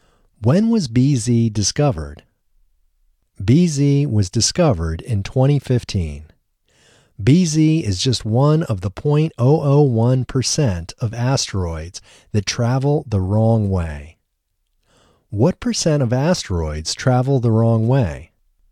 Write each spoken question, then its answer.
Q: What percent of asteroids travel the wrong way?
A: 0.001% of asteroids travel the wrong way.